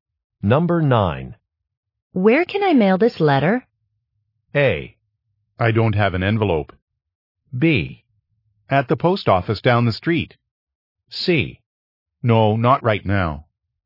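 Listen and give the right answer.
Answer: B: At the post office down the street.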